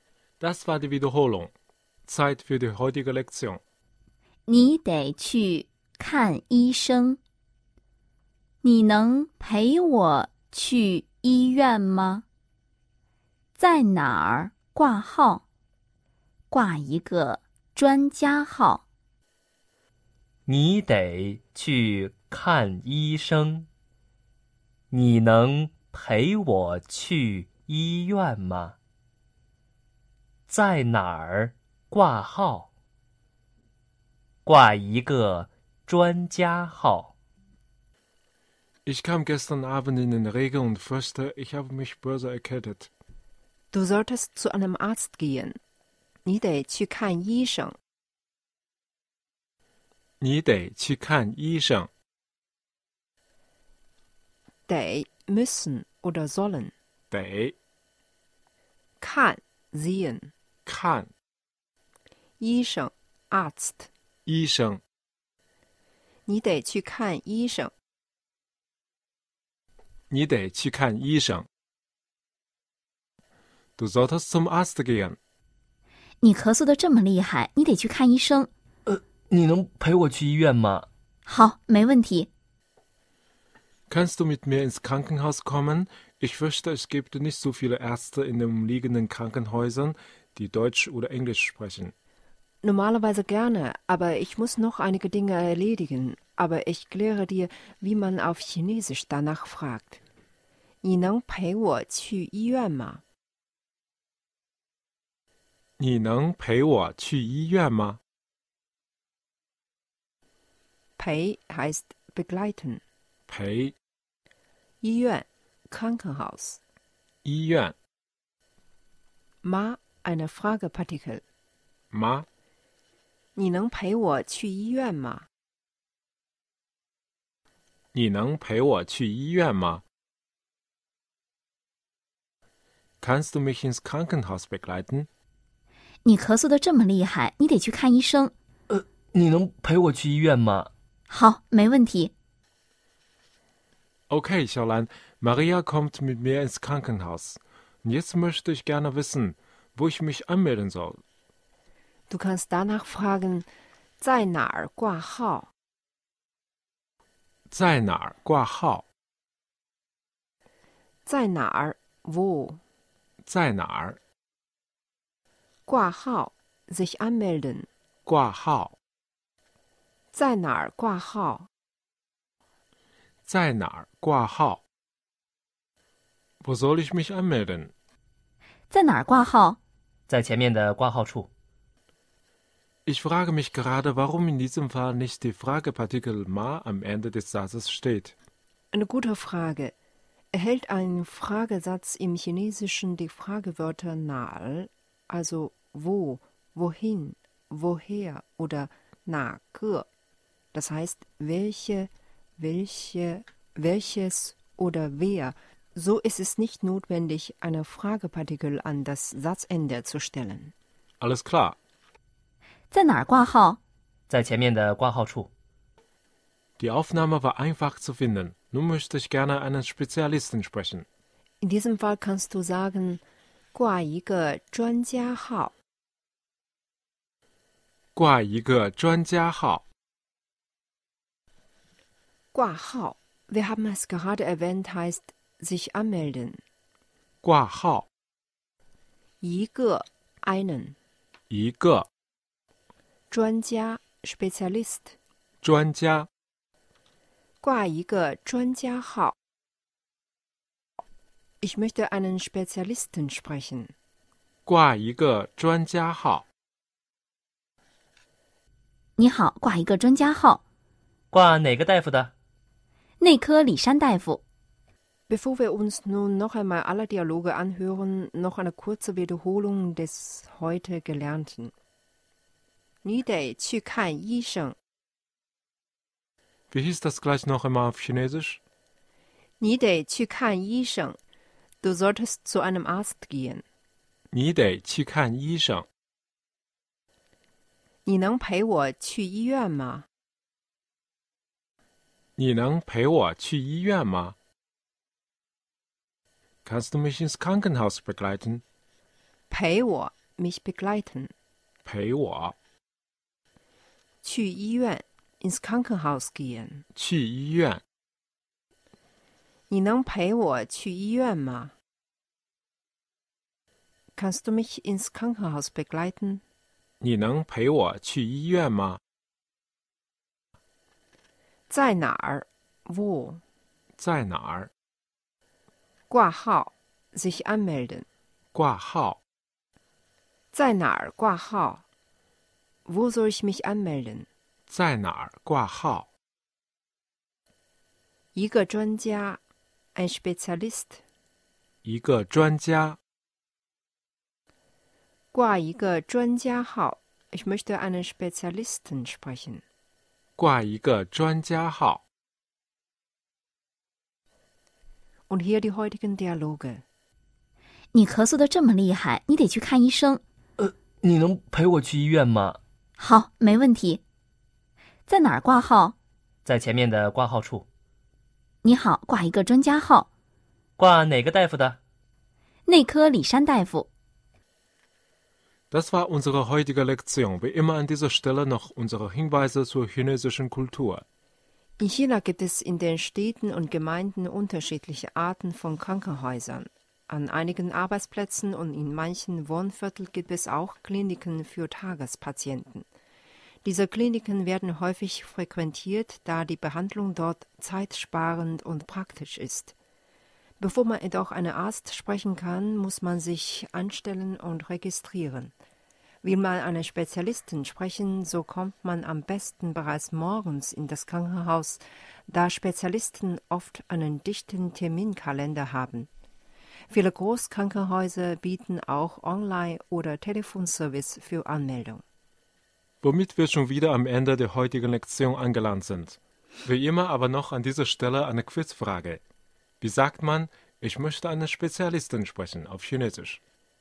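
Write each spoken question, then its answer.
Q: Wie sagt man, ich möchte eine Spezialistin sprechen auf Chinesisch?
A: 挂一个专家号。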